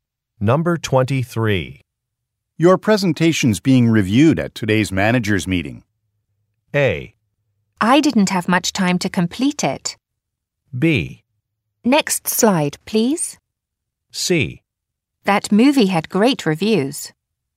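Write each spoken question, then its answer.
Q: Your presentation's being reviewed at today's manager's meeting.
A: A: I didn't have much time to complete it.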